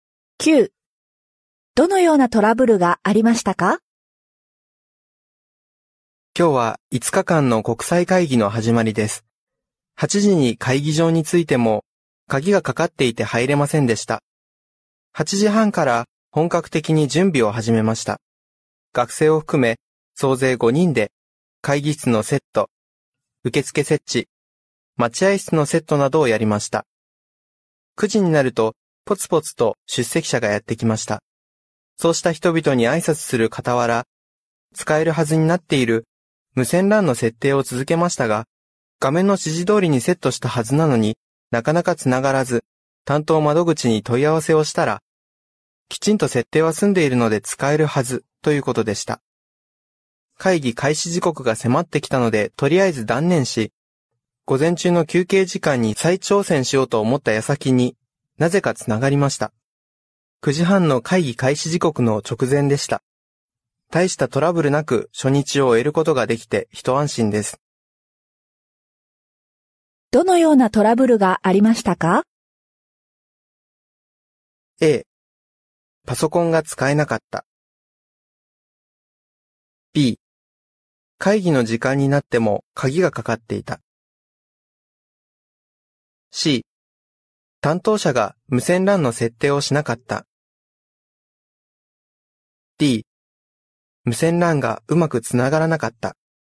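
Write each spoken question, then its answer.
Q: どのようなトラブルがありましたか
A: D: 無線 LAN がうまくつながらなかった。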